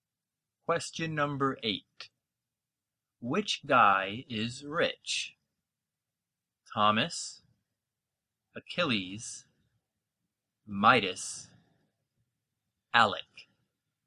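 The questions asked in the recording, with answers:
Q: Which guy is rich?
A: C: Midas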